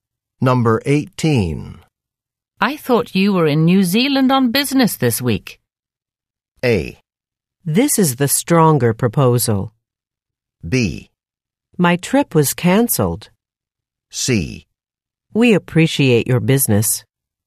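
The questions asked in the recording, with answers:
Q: I thought you were in New Zealand on business this week.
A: B: My trip was cancelled.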